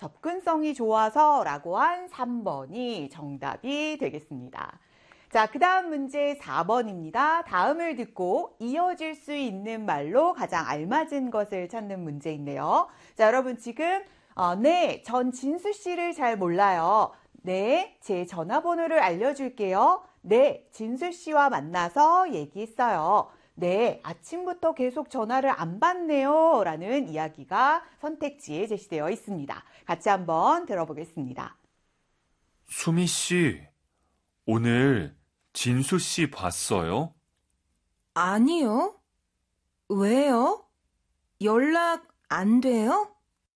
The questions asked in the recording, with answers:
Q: 다음을 듣고 이어질 수 있는 말로 가장 알맞은 것을 찾는 문제인데요.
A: 네, 아침부터 계속 전화를 안 받네요.